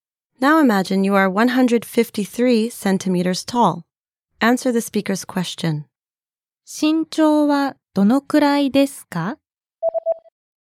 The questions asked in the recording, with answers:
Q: 身長はどのくらいですか?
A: 153センチです。